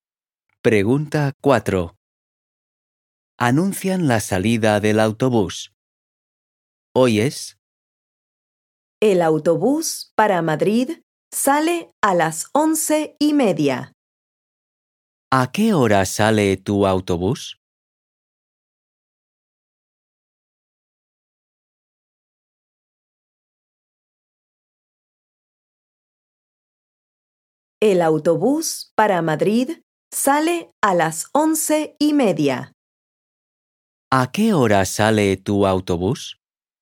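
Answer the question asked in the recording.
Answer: A las 11:30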